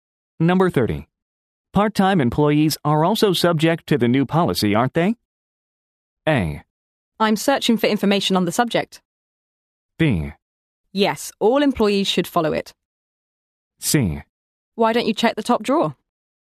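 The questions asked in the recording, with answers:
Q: Part time employees are also subject to the new policy, aren't they?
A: B: Yes, all employees should follow it.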